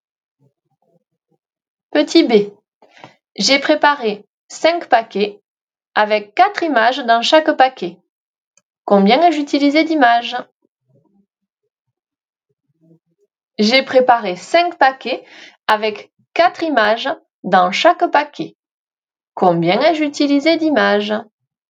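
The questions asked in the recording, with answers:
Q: Combien ai-je utilisé d'images?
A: 20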